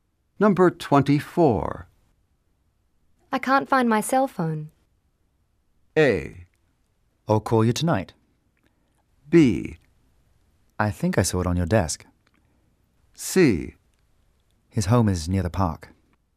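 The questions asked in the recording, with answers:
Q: I can't find my cell phone.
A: B: I think I saw it on your desk.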